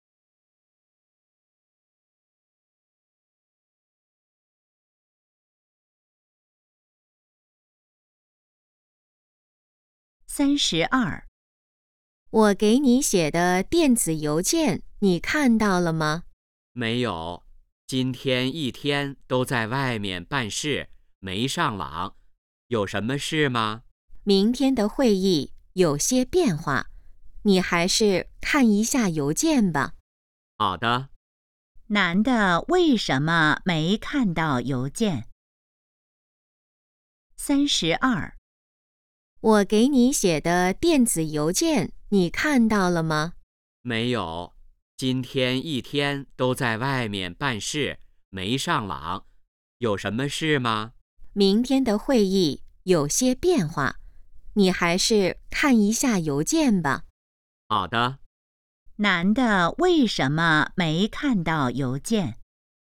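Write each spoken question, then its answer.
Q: 男的为什么没看到邮件?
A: 一天在外面办事,没上网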